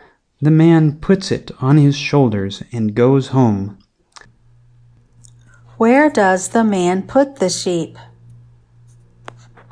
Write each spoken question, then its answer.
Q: Where does the man put the sheep?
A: The man puts the sheep on his shoulders.